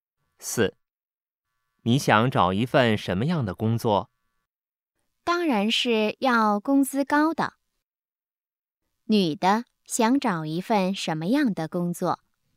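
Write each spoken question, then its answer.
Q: 女的想找一份什么样的工作?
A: 工资高的工作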